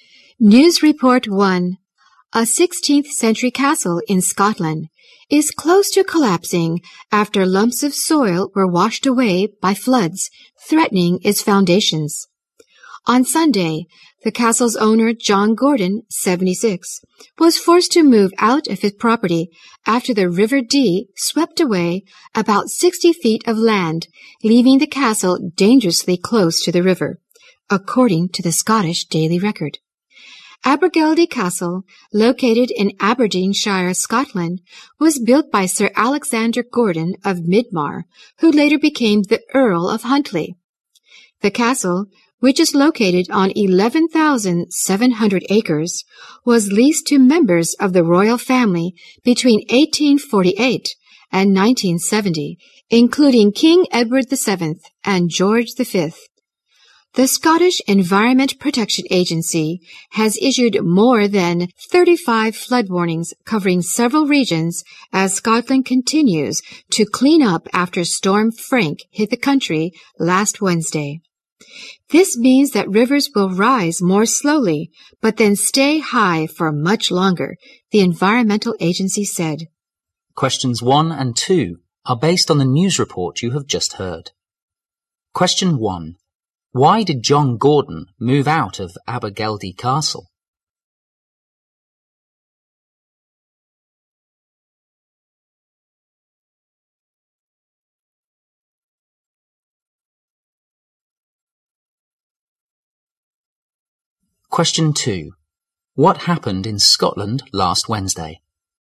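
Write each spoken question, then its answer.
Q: Why did John Gordon move out of Abergeldy Castle?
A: The river swept away land, leaving the castle dangerously close to collapse

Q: What happened in Scotland last Wednesday?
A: Storm Frank hit the country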